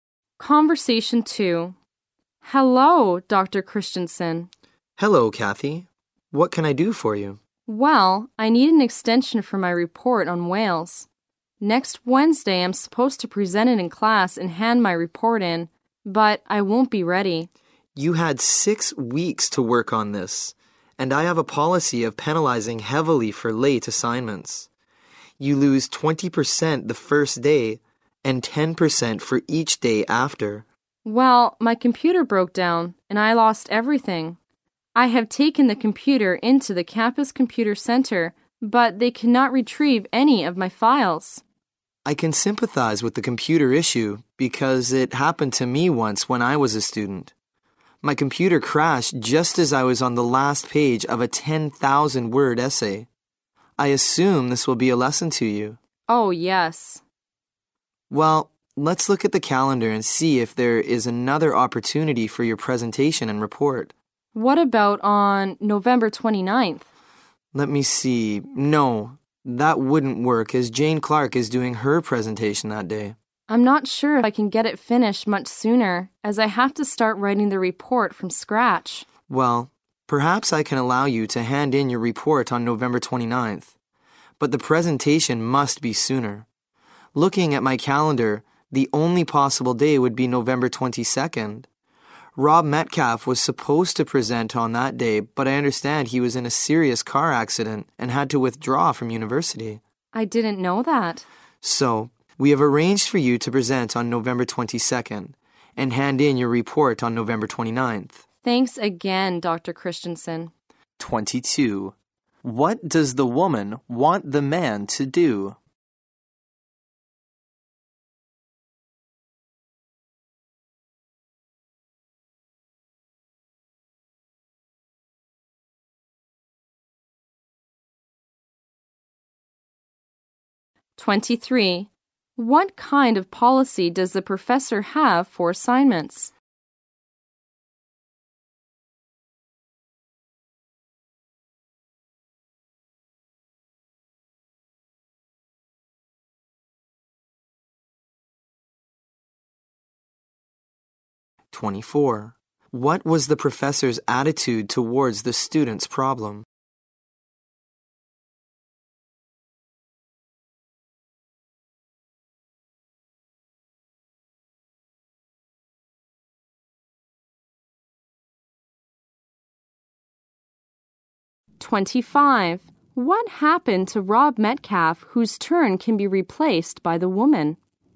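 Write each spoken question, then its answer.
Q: What does the woman want the man to do?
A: Give her an extension for her report.

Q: What kind of policy does the professor have for assignments?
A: Heavy penalties for late work: 20% lost on the first day and 10% for each day after.

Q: What was the professor's attitude towards the student's problem?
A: Sympathetic.

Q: What happened to Rob Metcalf, whose turn can be replaced by the woman?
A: He was in a serious car accident and withdrew from university.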